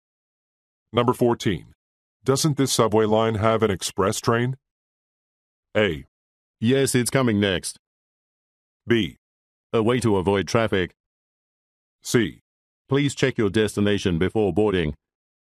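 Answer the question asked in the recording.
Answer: A: Yes, it's coming next.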